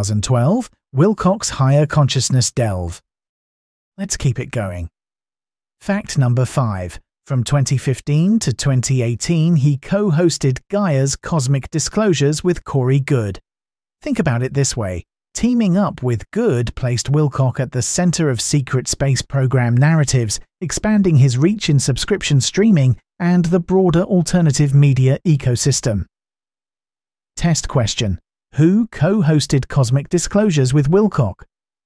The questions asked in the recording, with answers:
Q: Who co-hosted Cosmic Disclosures with Wilcock?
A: Correct answer, Corey Good.